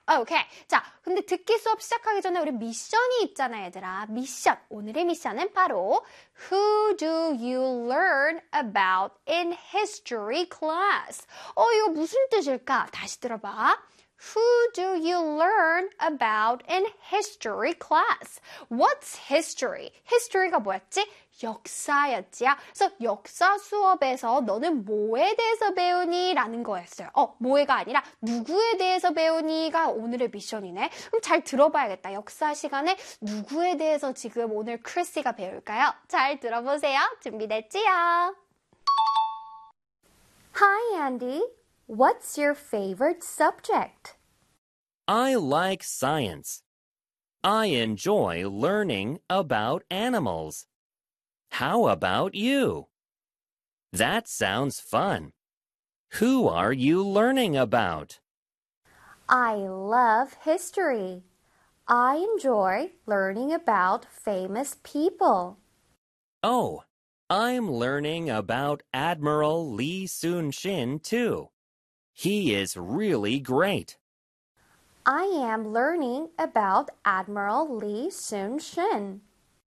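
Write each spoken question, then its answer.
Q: Who do you learn about in history class?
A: Admiral Lee Soon-shin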